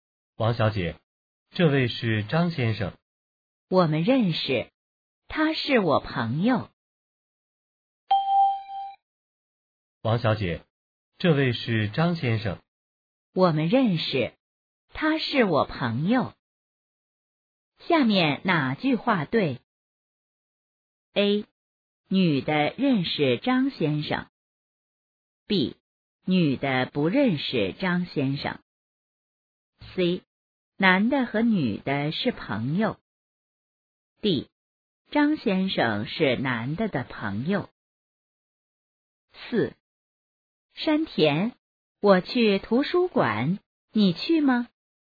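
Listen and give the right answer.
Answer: A: 女的认识张先生。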